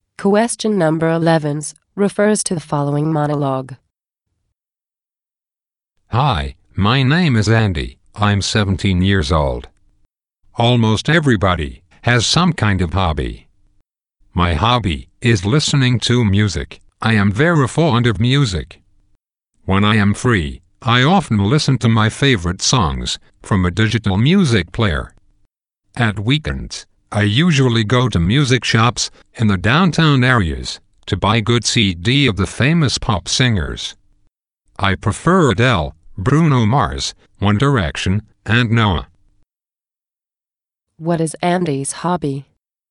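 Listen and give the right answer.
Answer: Listening to music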